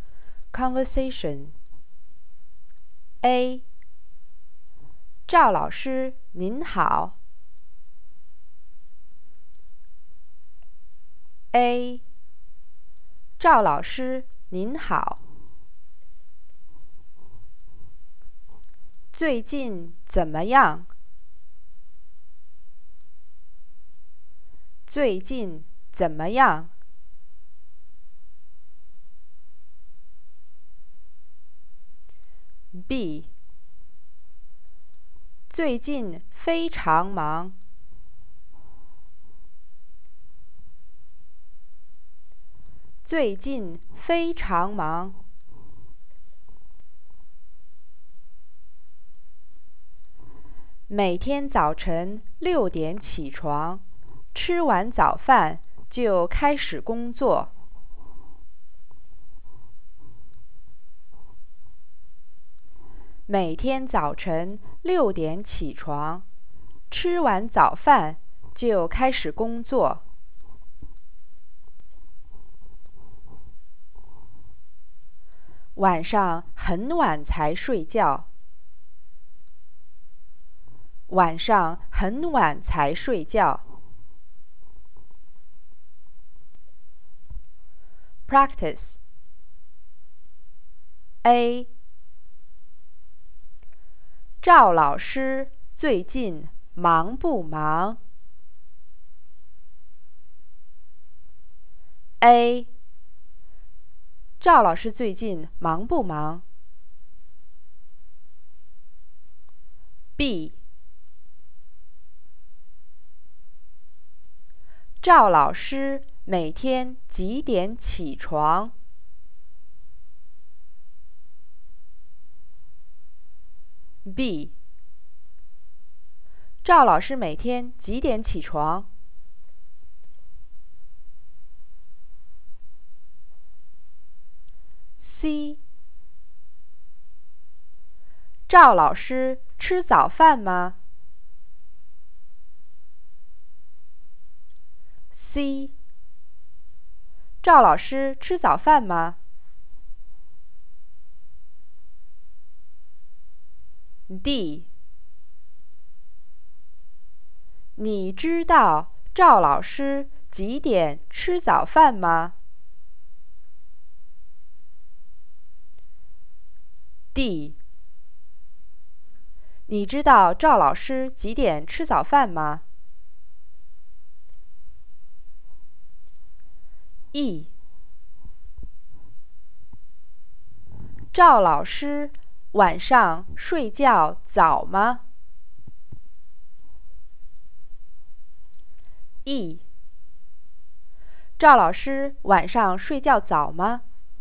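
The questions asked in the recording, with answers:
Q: 赵老师最近忙不忙?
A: 很忙,非常忙

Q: 赵老师每天几点起床?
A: 早晨6点

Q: 赵老师晚上睡觉早吗?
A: 不早,很晚才睡觉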